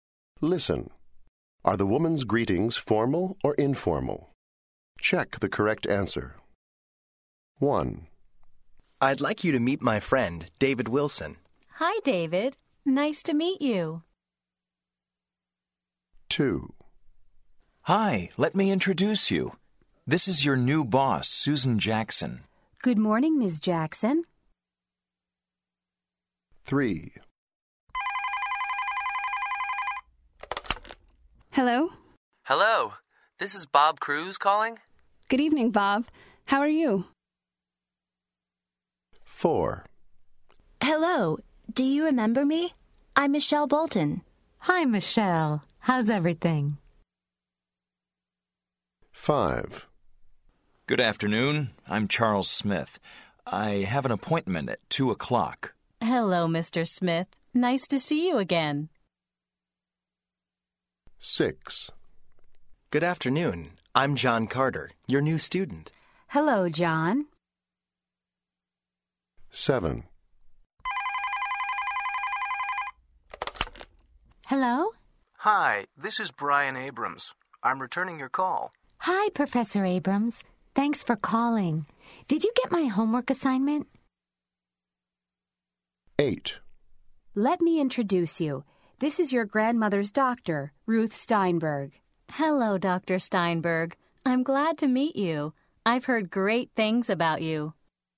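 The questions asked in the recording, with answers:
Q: Are the woman's greetings formal or informal?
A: informal

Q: Are the woman's greetings formal or informal?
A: formal

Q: Are the woman's greetings formal or informal?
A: informal

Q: Are the woman's greetings formal or informal?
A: formal

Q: Are the woman's greetings formal or informal?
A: informal

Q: Are the woman's greetings formal or informal?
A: formal

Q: Are the woman's greetings formal or informal?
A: formal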